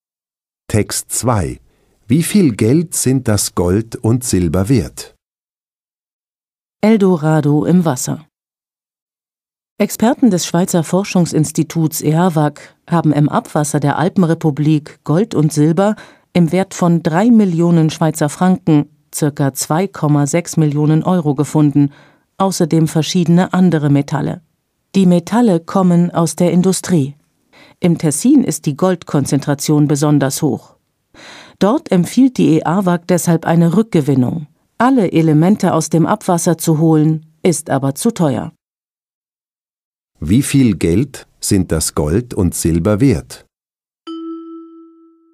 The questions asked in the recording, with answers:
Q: Wie viel Geld sind das Gold und Silber wert?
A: Sie sind 3 Millionen Schweizer Franken oder ca.